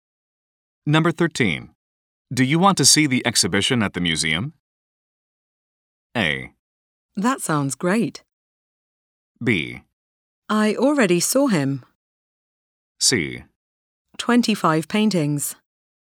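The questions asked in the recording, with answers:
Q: Do you want to see the exhibition at the museum?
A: A: That sounds great.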